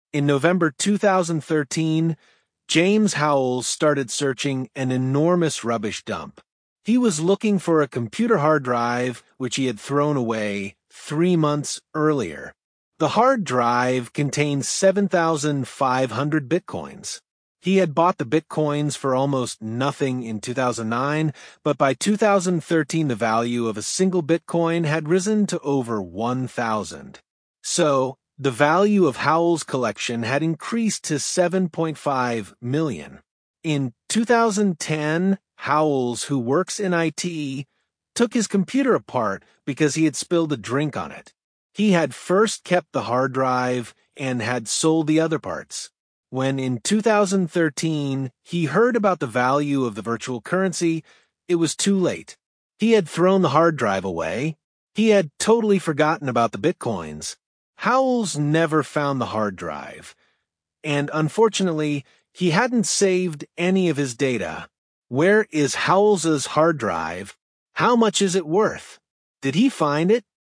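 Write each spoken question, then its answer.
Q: Where is Howells's hard drive?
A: In an enormous rubbish dump

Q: How much is it worth?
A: 7.5 million (7,500 bitcoins)

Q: Did he find it?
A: No, he never found it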